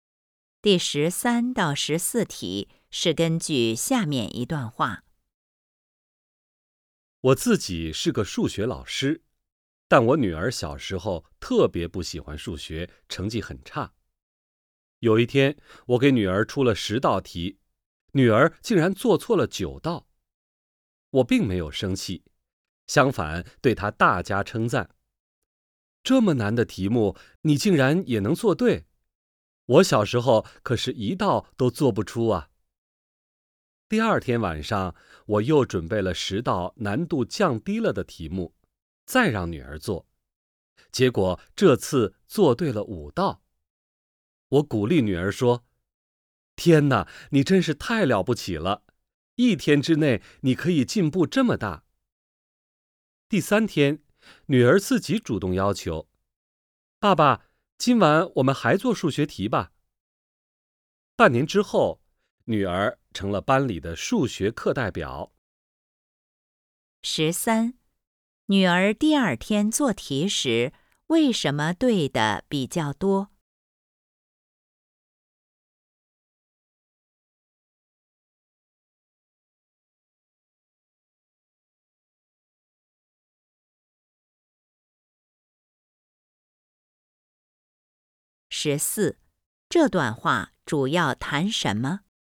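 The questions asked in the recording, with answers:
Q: 女儿第二天做题时,为什么对的比较多?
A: 题目难度降低了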